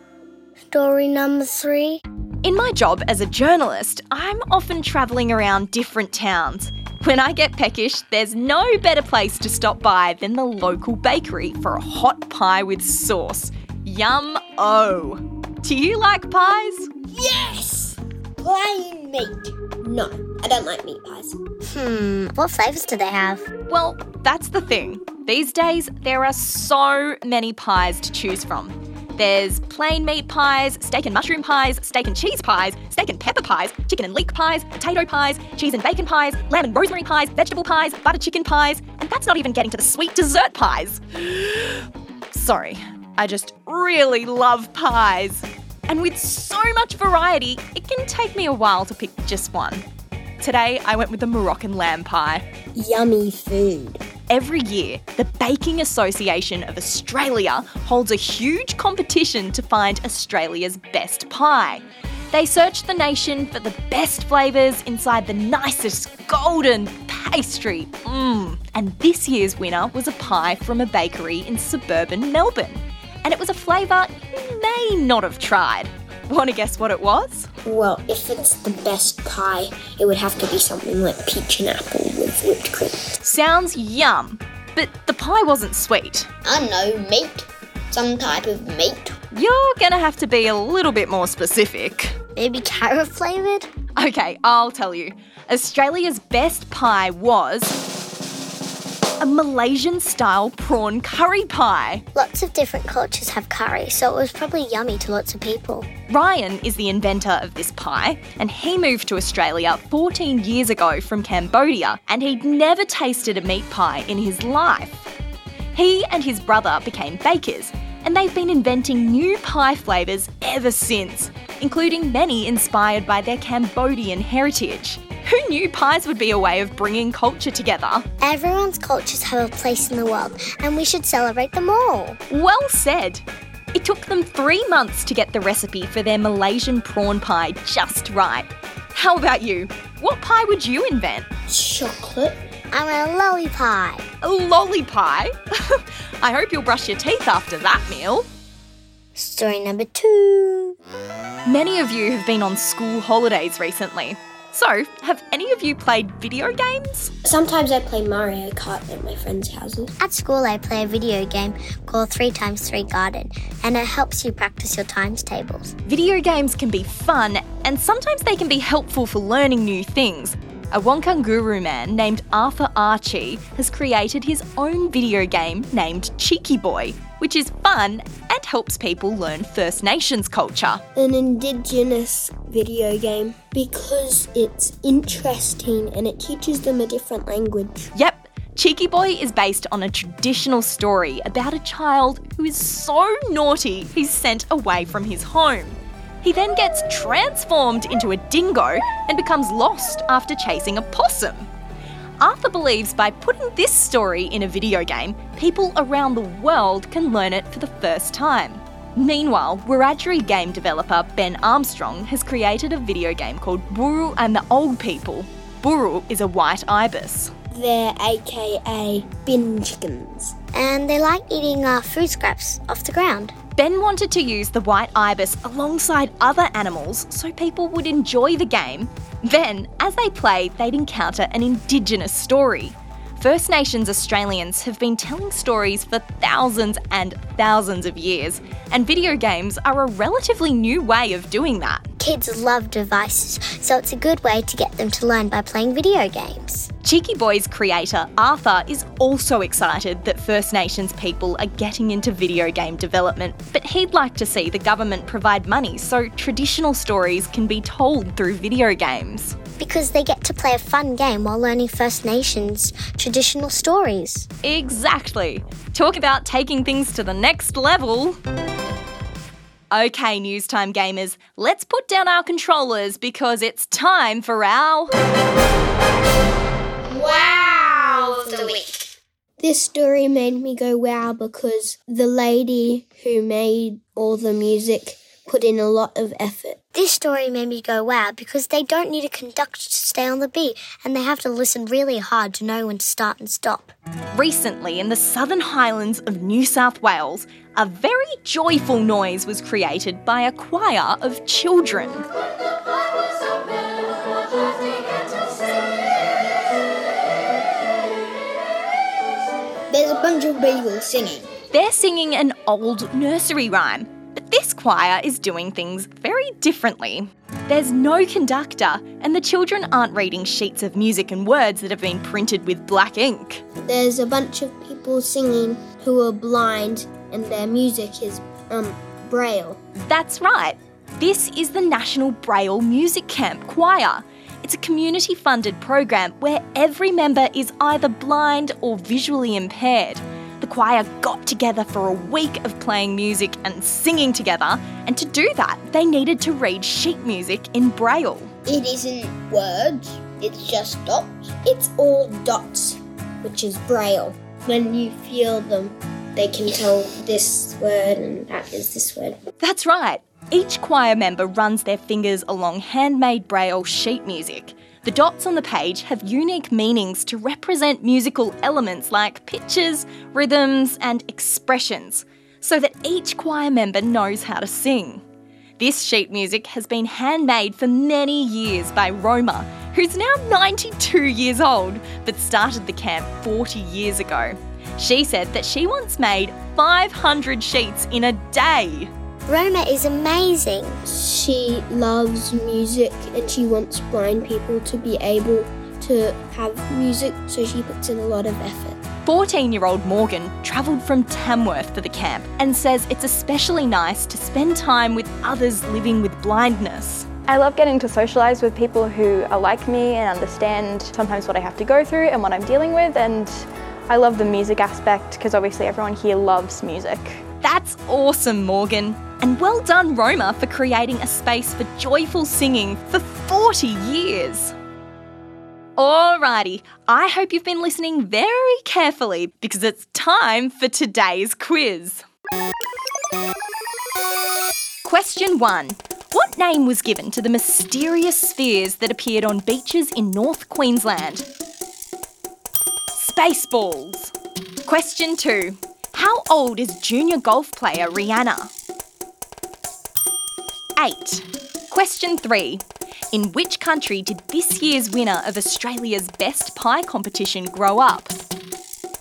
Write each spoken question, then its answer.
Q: In which country did this year's winner of Australia's Best Pie competition grow up?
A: Cambodia.